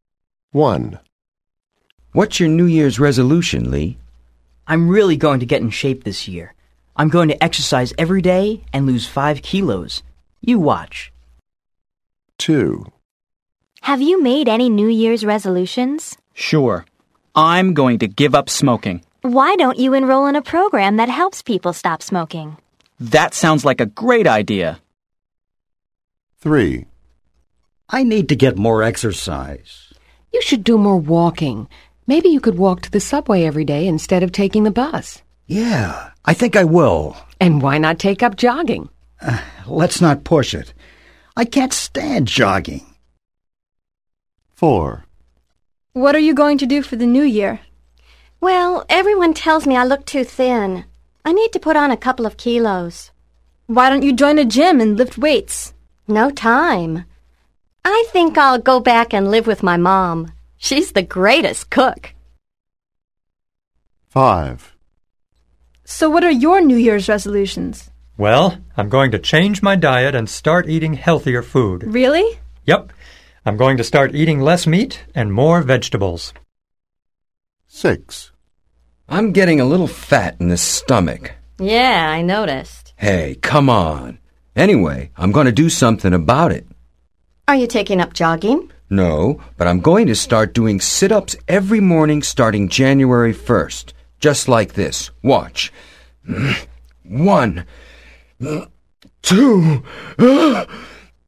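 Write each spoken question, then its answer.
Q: What is each person going to do?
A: Exercise every day and lose 5 kilos

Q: What is each person going to do?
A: Give up smoking

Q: What is each person going to do?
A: Walk to the subway every day

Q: What is each person going to do?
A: Put on weight by living with his mom

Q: What is each person going to do?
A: Eat healthier food: less meat, more vegetables

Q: What is each person going to do?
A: Do sit-ups every morning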